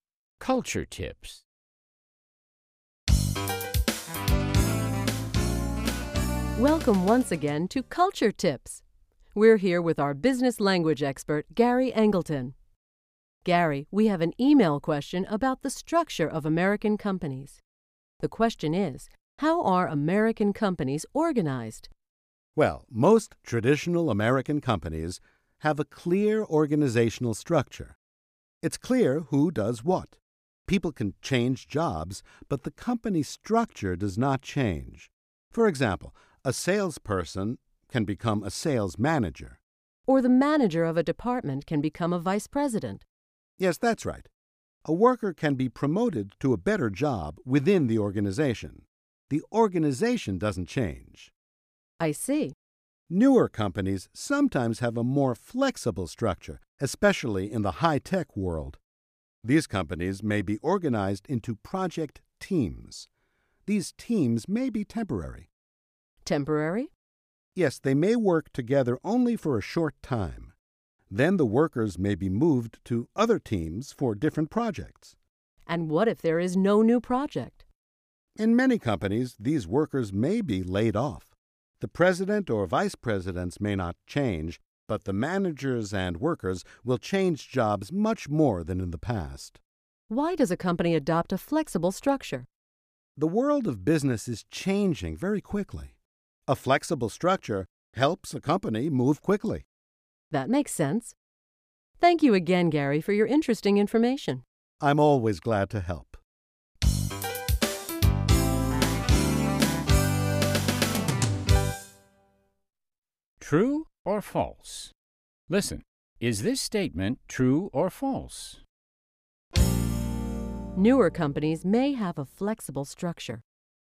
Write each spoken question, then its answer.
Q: Newer companies may have a flexible structure.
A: True. Newer companies, especially high-tech companies, often have a more flexible structure than traditional companies.